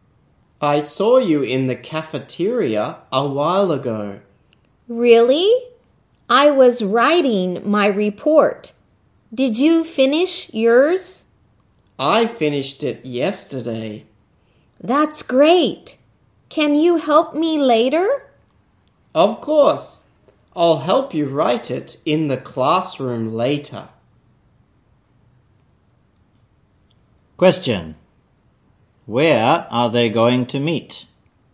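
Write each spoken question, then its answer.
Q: Question. Where are they going to meet?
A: In the classroom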